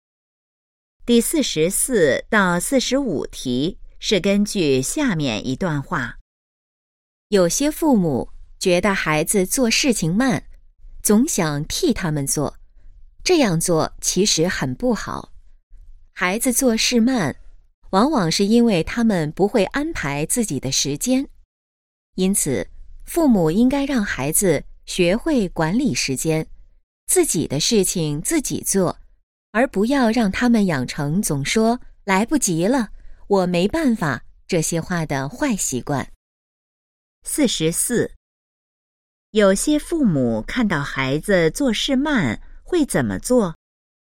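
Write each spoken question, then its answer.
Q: 有些父母看到孩子做事慢会怎么做?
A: 总想替他们做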